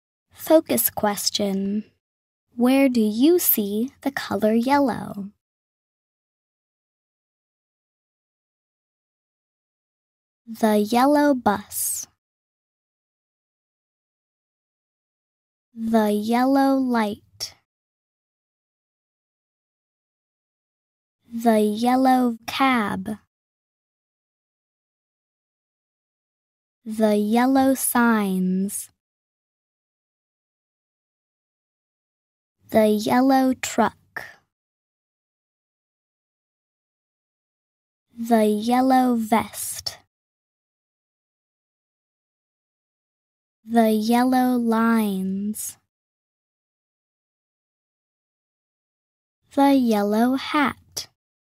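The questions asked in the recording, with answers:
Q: Where do you see the color yellow?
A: On the bus, light, cab, signs, truck, vest, lines and hat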